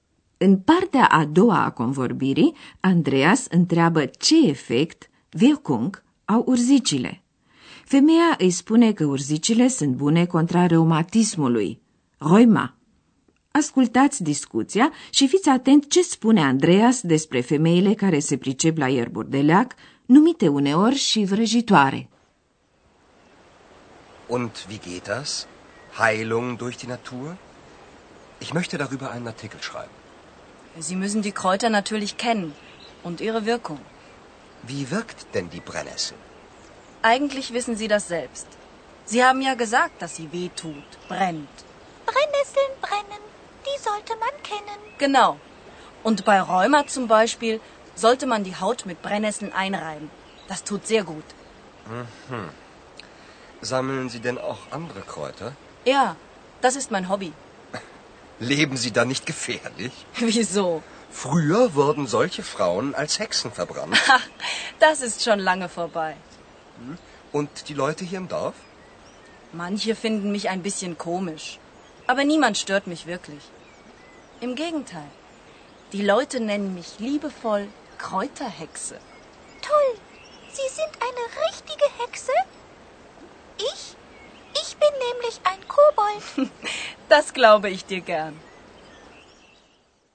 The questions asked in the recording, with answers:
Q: Ascultați discuția și fiți atent ce spune Andreas despre femeile care se pricep la ierburi de leac, numite uneori și vrăjitoare.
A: Andreas amintește că pe vremuri se întâmpla ca femeile care adunau ierburi de leac să fie arse ca vrăjitoare, deoarece se credea că ele au puteri magice.